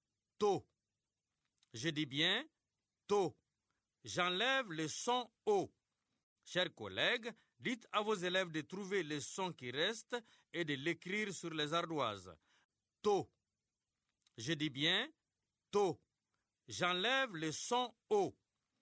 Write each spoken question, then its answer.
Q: To. Je dis bien « to ». J'enlève le son « o ».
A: C'est le son « t ».